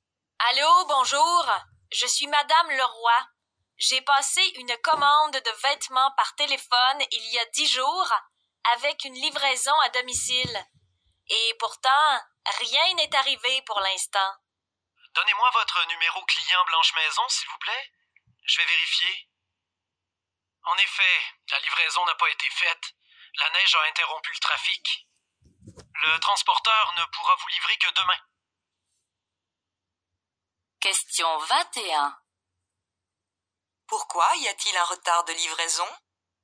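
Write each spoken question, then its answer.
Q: Pourquoi y a-t-il un retard de livraison?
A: La neige a interrompu le trafic.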